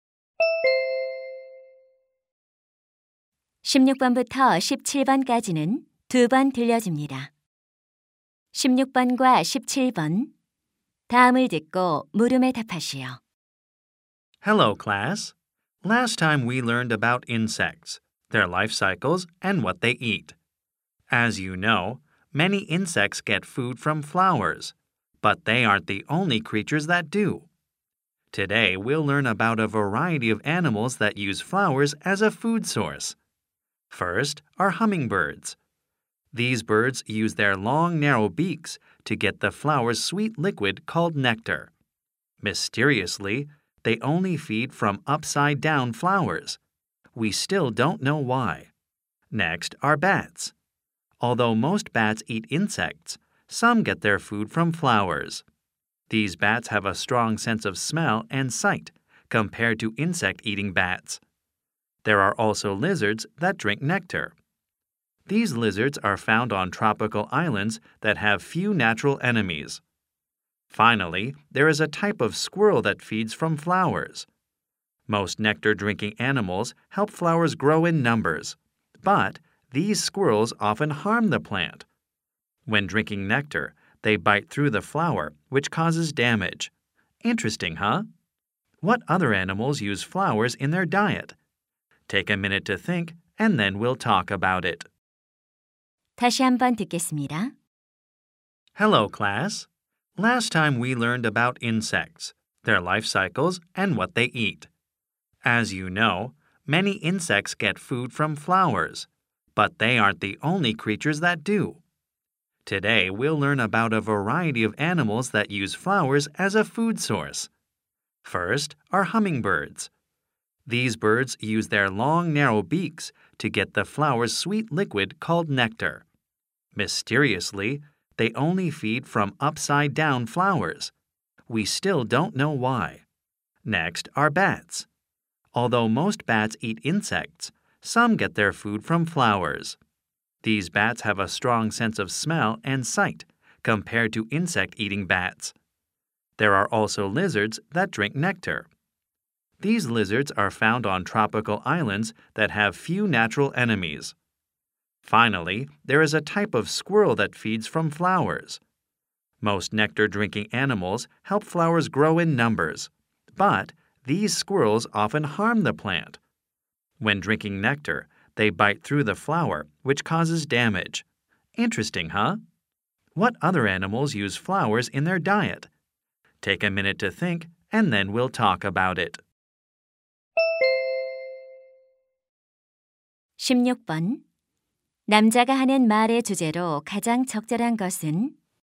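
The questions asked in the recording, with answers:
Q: 남자가 하는 말의 주제로 가장 적절한 것은?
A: 꽃을 먹이원으로 이용하는 다양한 동물들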